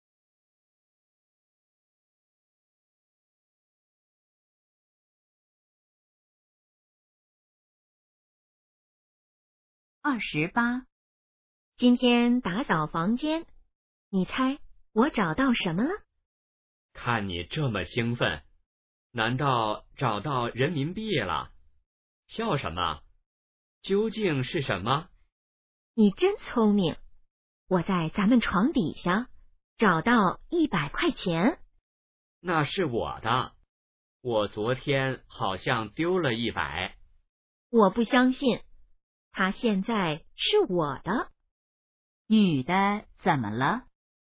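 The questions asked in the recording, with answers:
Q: 女的怎么了?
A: 找到了100块钱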